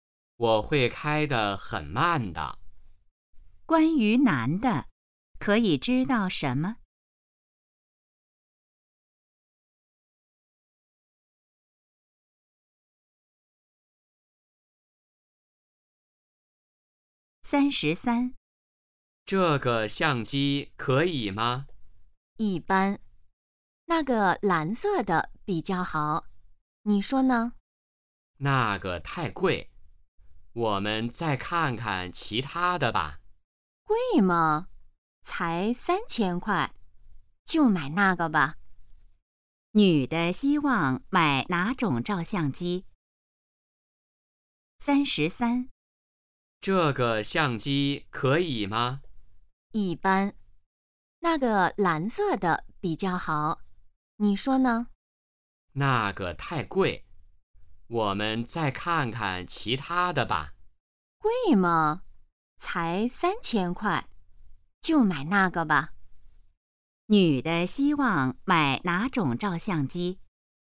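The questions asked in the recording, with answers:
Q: 女的希望买哪种照相机?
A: 蓝色的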